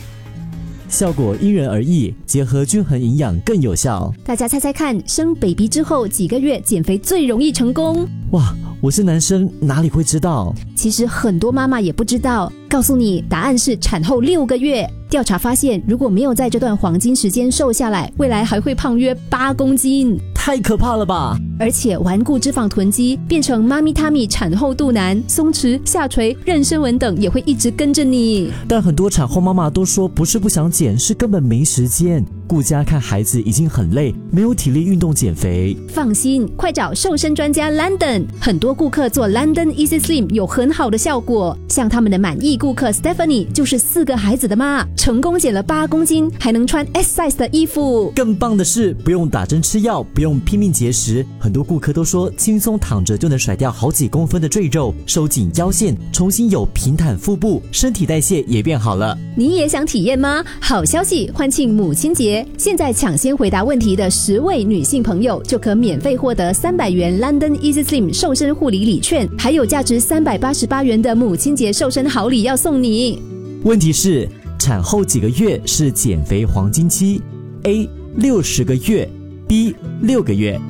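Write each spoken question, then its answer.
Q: 问题是,产后几个月是减肥黄金期 ?A 60个月 ,B 6个月。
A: B: 6个月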